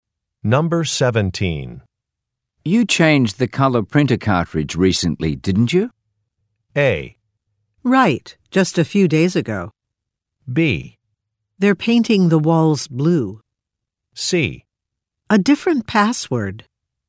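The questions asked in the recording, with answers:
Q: You changed the color printer cartridge recently, didn't you?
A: A: Right, just a few days ago.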